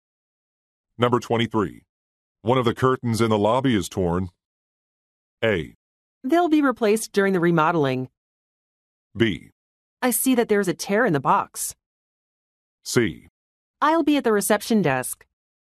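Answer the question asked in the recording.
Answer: A: They'll be replaced during the remodeling.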